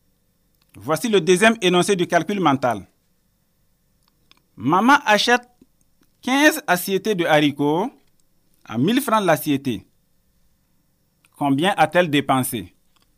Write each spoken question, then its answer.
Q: Maman achète 15 assiettes de haricots à 1000 francs l'assiette. Combien a-t-elle dépensé?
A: La bonne réponse est 15 000 francs.